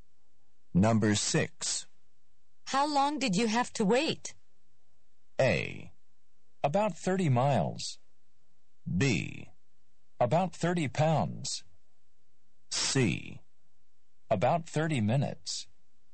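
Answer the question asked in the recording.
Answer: C: About 30 minutes.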